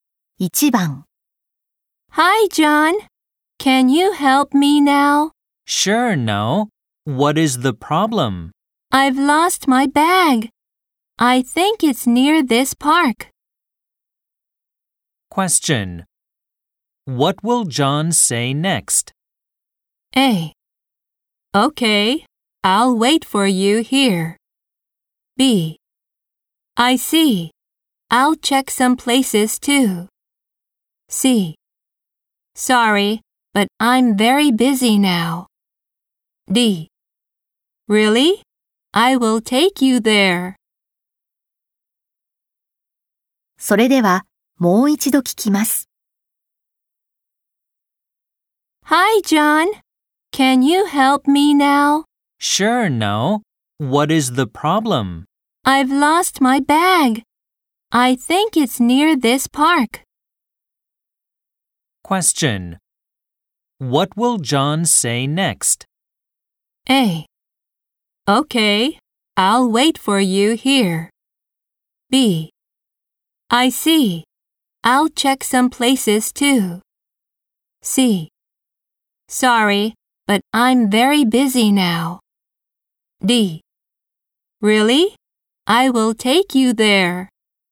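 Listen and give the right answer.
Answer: B: I see. I'll check some places too.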